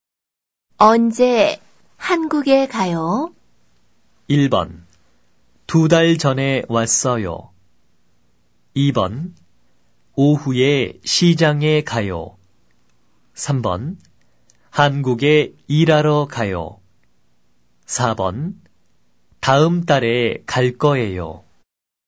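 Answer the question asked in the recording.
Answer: 4: 다음 달에 갈 거예요.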